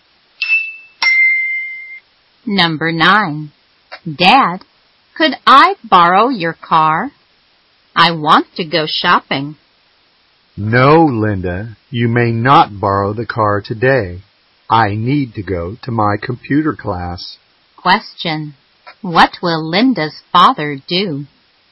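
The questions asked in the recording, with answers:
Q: Question. What will Linda's father do?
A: Go to his computer class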